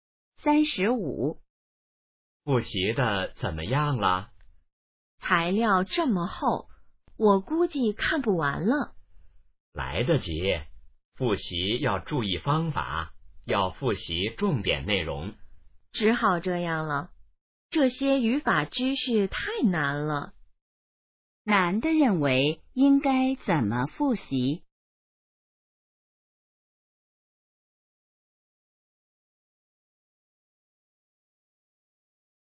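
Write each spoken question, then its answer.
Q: 男的认为应该怎么复习?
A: 复习重点内容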